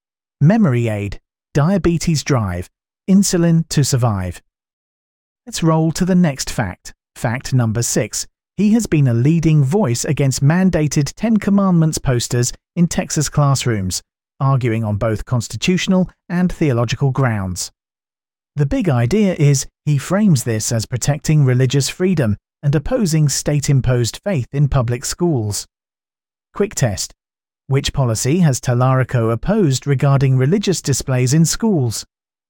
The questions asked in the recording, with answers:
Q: Which policy has Tallarico opposed regarding religious displays in schools?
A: Correct answer. Mandated Ten Commandments posters.